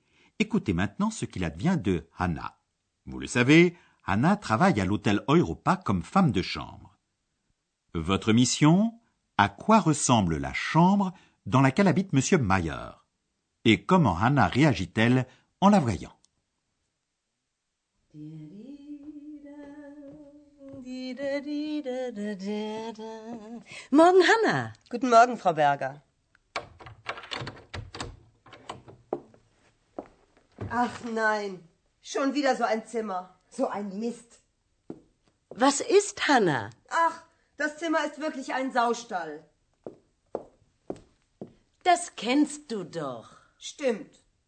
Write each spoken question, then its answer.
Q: À quoi ressemble la chambre dans laquelle habite M. Mayer Et comment Hannah réagit-elle en la voyant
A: Hanna trouve que la chambre ressemble à une porcherie, et cela la rend furieuse.